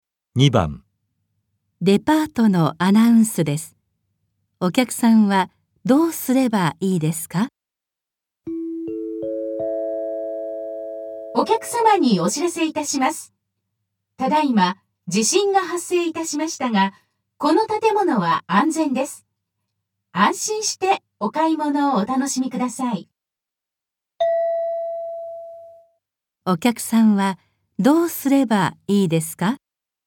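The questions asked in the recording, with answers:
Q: お客さんはどうすればいいですか?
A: 安心して買い物を続ける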